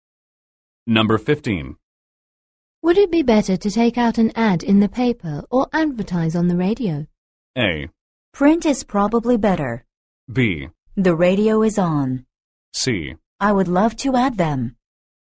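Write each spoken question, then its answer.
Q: Would it be better to take out an ad in the paper or advertise on the radio?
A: A: Print is probably better.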